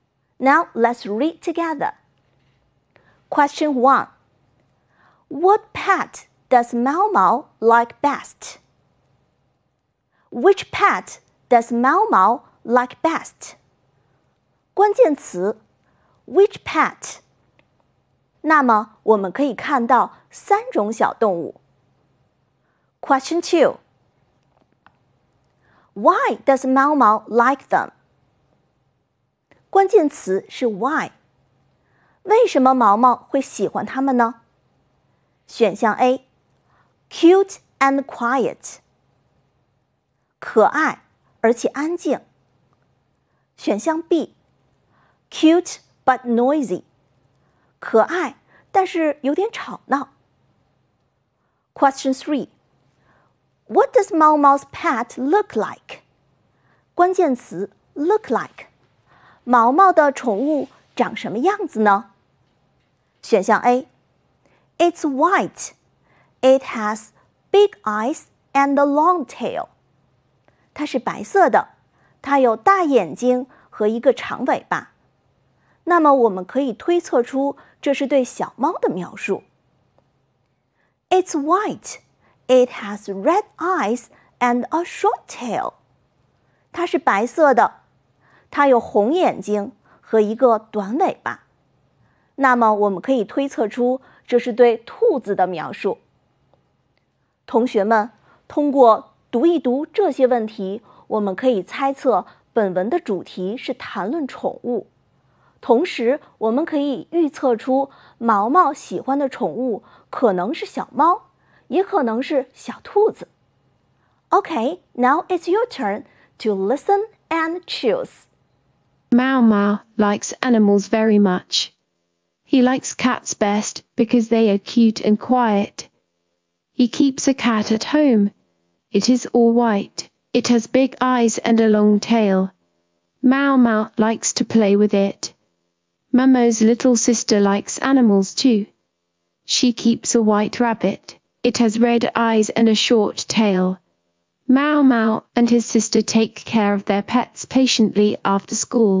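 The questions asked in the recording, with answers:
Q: Which pet does Mao Mao like best?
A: Cats

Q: Why does Mao Mao like them?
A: A: Cute and quiet.

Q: What does Mao Mao's pet look like?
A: A: It's white. It has big eyes and a long tail.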